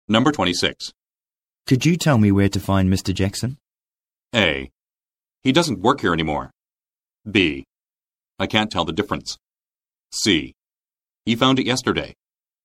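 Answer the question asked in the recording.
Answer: A: He doesn't work here anymore.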